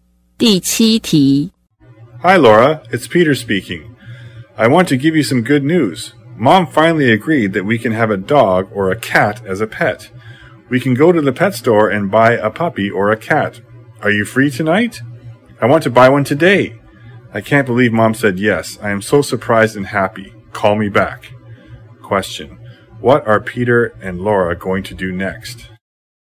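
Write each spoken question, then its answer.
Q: What are Peter and Laura going to do next?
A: Go to the pet store to buy a pet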